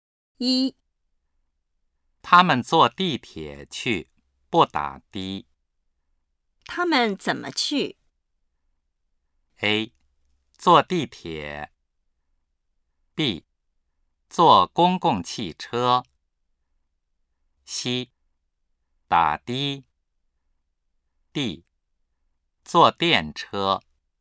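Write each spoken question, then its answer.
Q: 他们怎么去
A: A: 坐地铁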